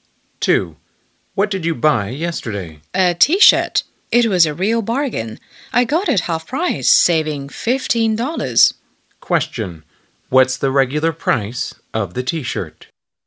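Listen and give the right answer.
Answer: $30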